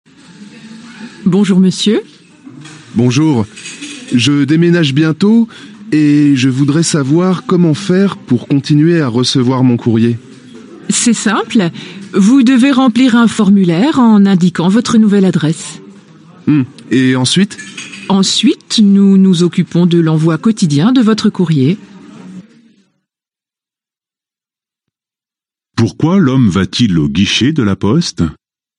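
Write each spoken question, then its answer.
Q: Pourquoi l'homme va-t-il au guichet de la poste ?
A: Pour faire suivre son courrier à sa nouvelle adresse, car il déménage.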